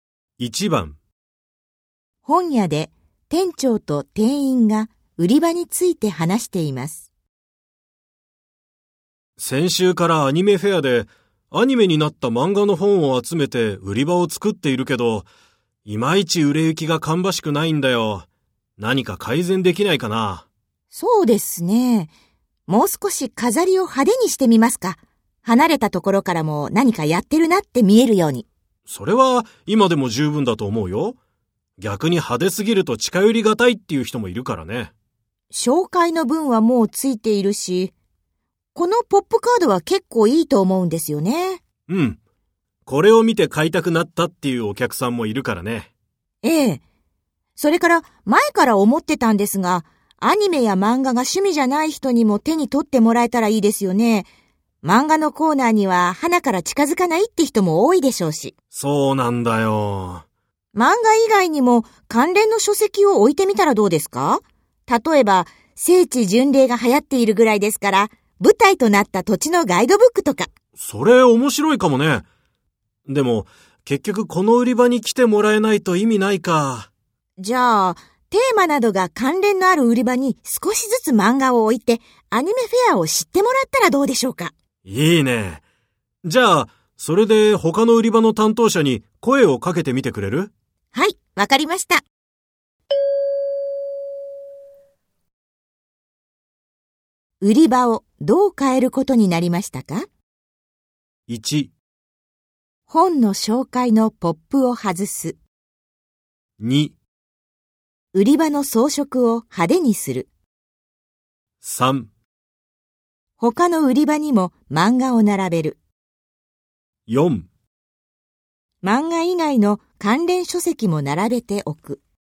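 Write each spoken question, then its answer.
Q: 売り場をどう変えることになりましたか?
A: 3: 他の売り場にも漫画を並べる。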